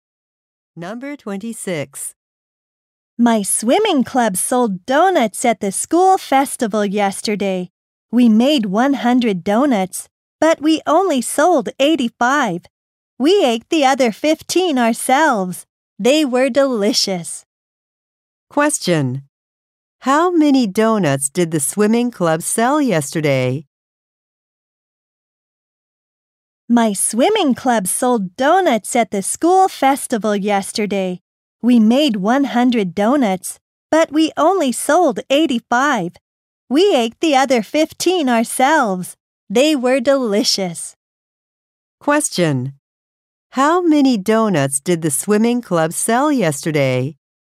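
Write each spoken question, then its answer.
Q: How many donuts did the swimming club sell yesterday?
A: 85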